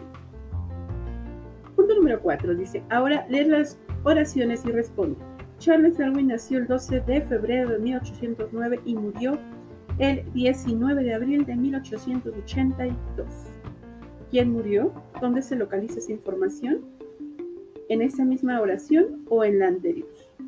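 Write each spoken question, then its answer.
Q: ¿Quién murió?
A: Charles Darwin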